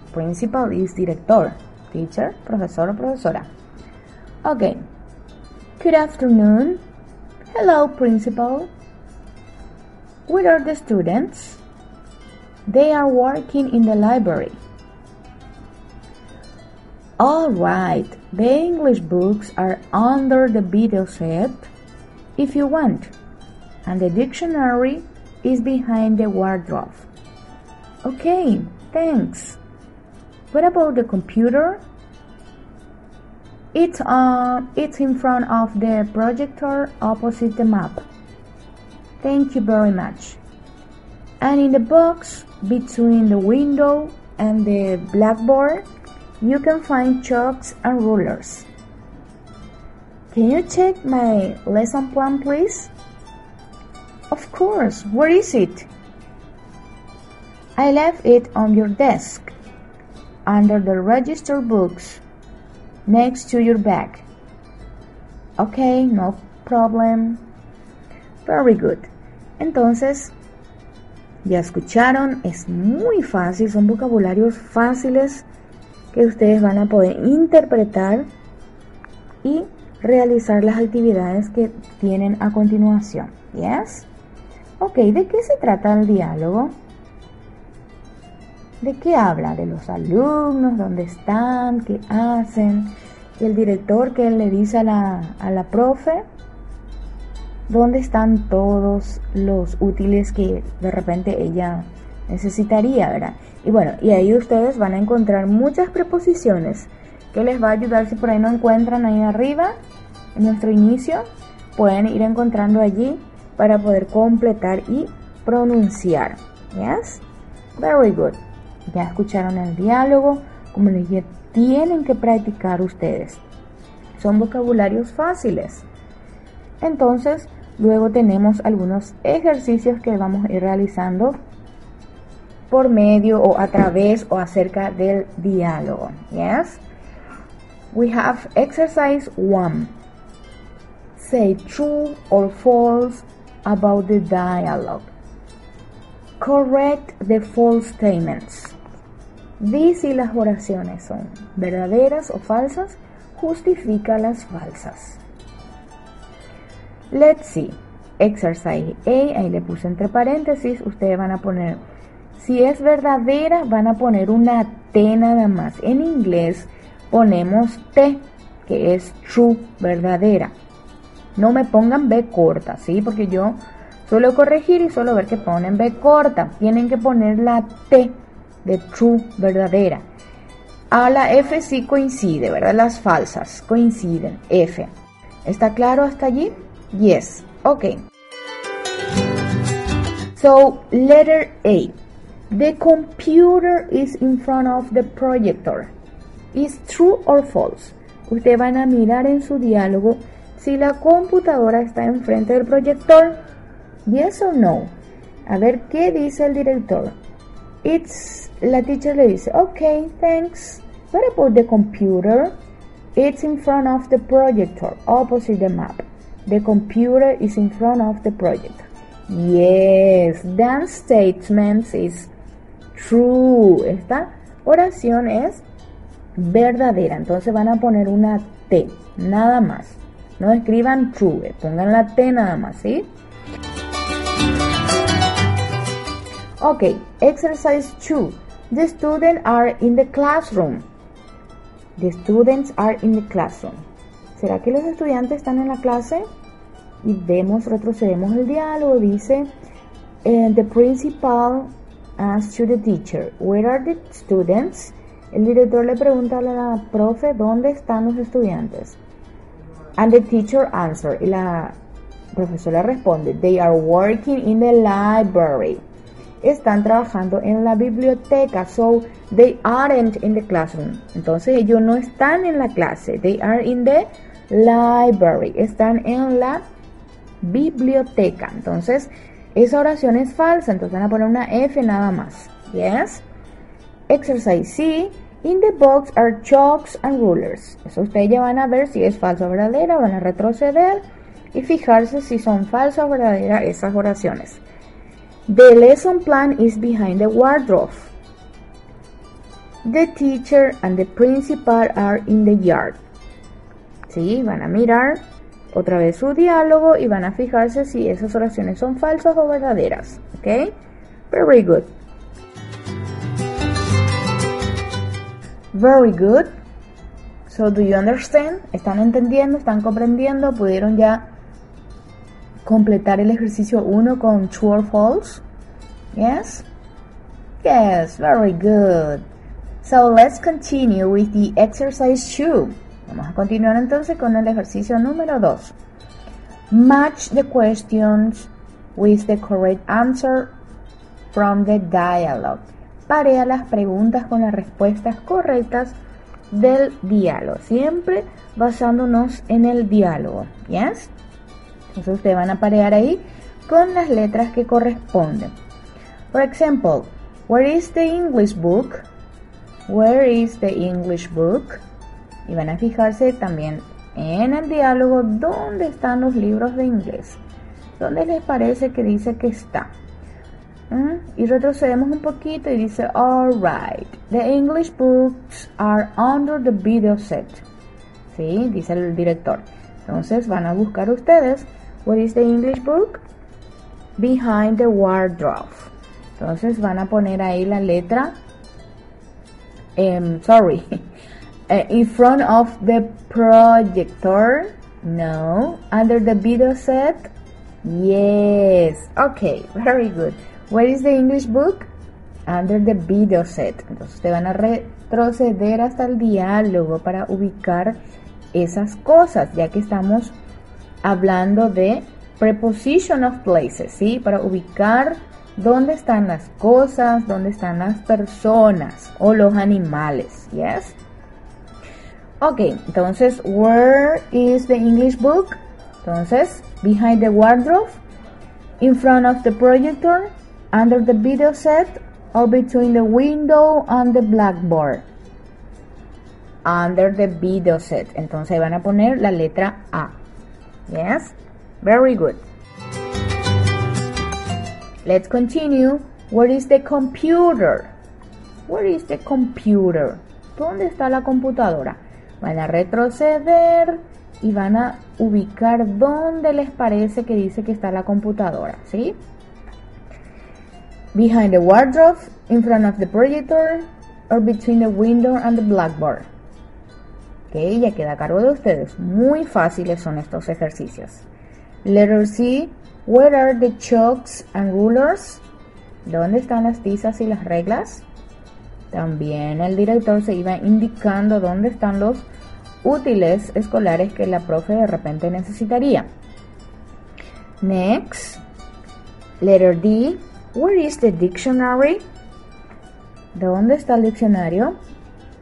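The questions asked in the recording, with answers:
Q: In the box are chalks and rulers.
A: True

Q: The lesson plan is behind the wardrobe.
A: False: it is on the desk, under the register books

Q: Where is the computer?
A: In front of the projector

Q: where are the chalks and rulers?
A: Between the window and the blackboard

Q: where is the dictionary?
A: Behind the wardrobe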